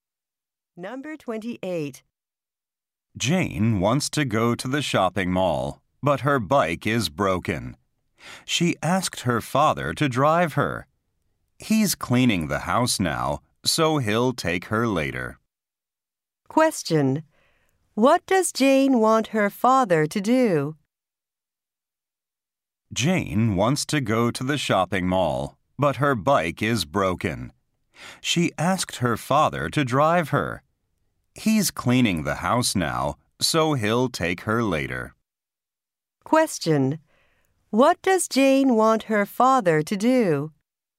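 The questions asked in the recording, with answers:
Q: What does Jane want her father to do?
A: Drive her to the shopping mall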